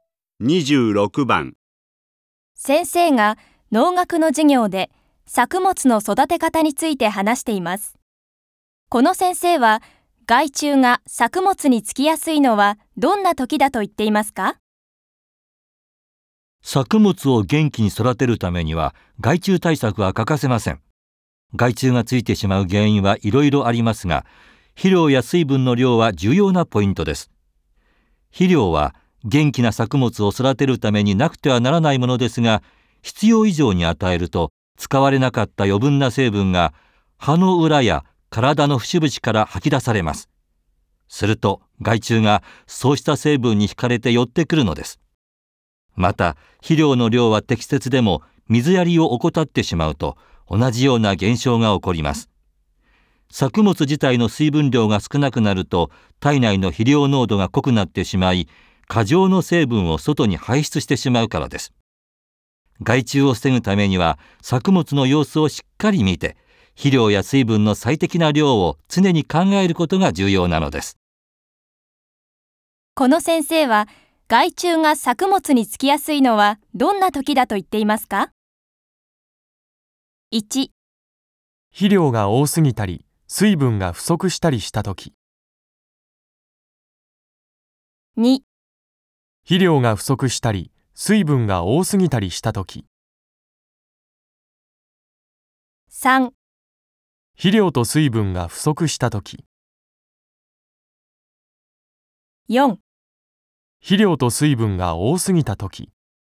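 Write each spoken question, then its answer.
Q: この先生は害虫が作物につきやすいのはどんな時だと言っていますか?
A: 1: 肥料が多すぎたり水分が不足したりした時。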